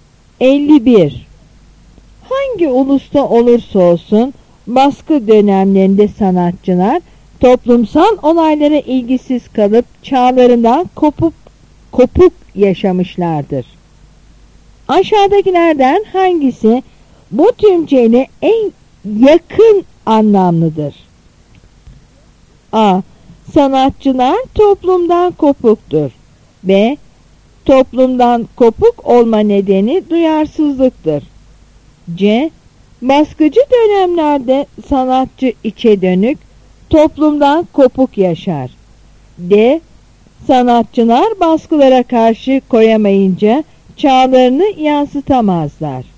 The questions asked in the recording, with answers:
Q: Aşağıdakilerden hangisi bu tümceyle en yakın anlamlıdır?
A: Yanıt C.